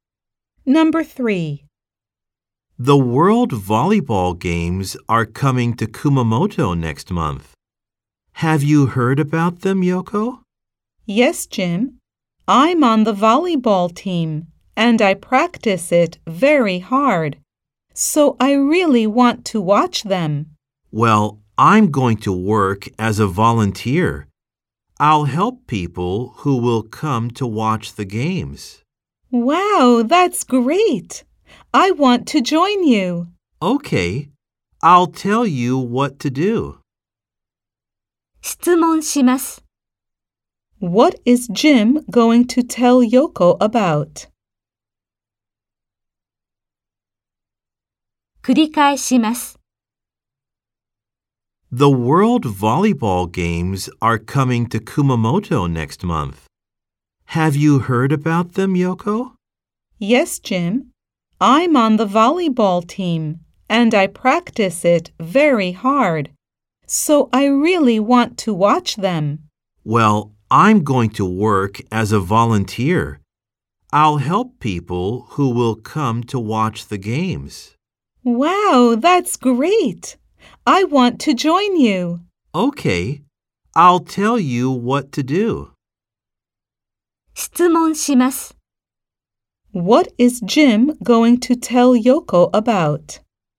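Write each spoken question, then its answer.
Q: What is Jim going to tell Yoko about?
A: What to do as a volunteer at the World Volleyball Games.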